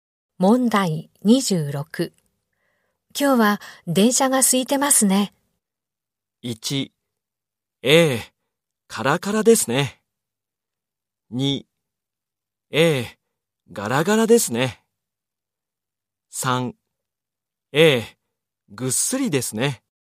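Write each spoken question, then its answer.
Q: 今日は電車が空いてますね。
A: 2: ええ、ガラガラですね。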